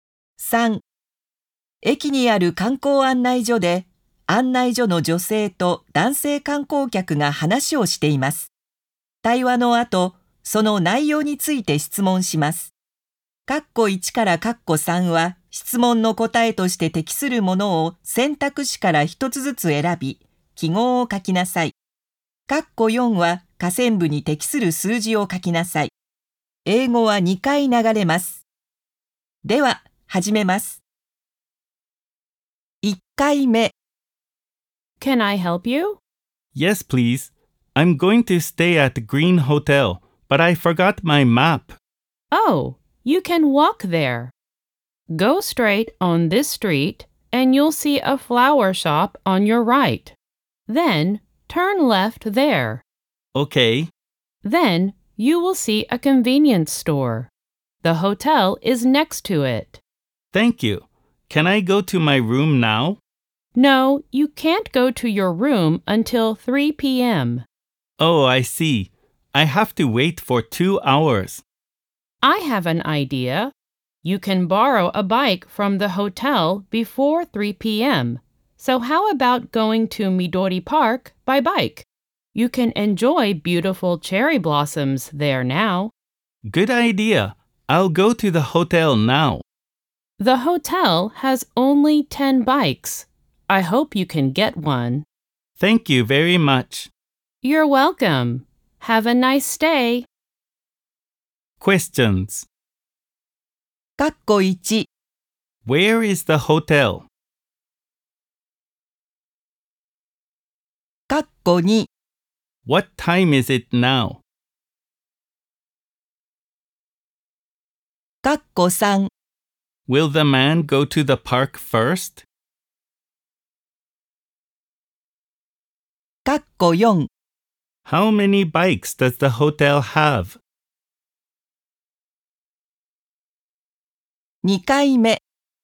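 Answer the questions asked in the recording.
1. Next to a convenience store
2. 1 p.m.
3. No, he will go to the hotel first
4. 10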